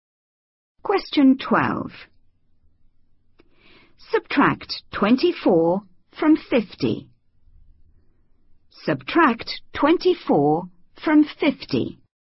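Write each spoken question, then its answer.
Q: Subtract 24 from 50.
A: 26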